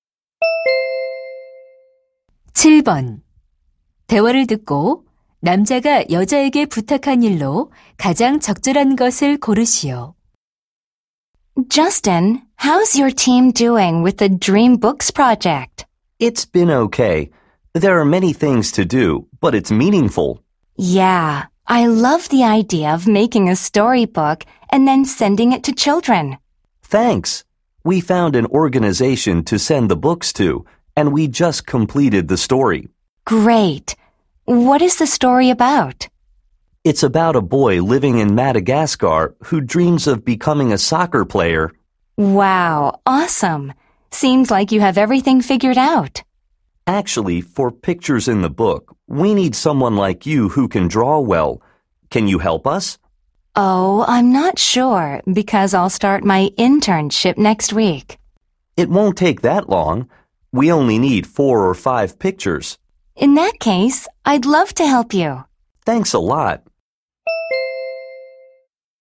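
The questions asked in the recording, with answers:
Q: 대화를 듣고 남자가 여자에게 부탁한 일로 가장 적절한 것을 고르시오.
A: 동화책 그림 그려 주기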